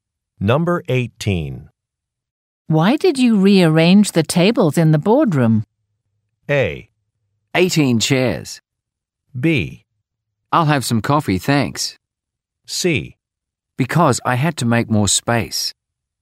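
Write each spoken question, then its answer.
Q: Why did you rearrange the tables in the boardroom?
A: C: Because I had to make more space.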